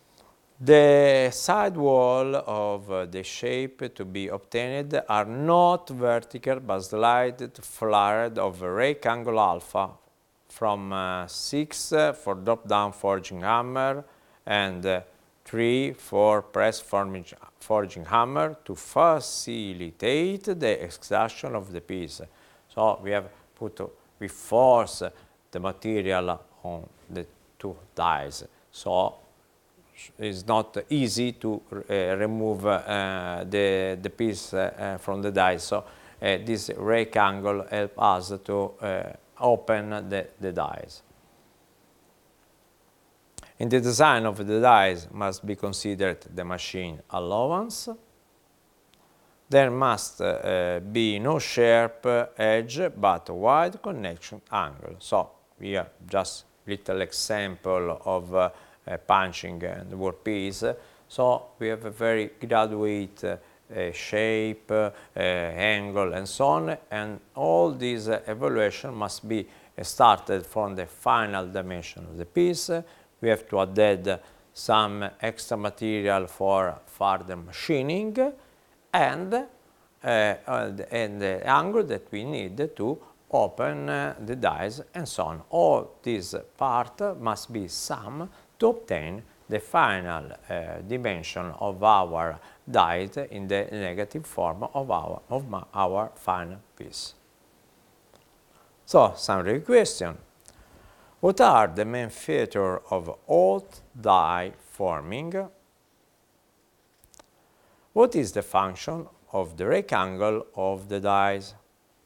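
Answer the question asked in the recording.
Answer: To make it easier to get the piece out of the dies and to open them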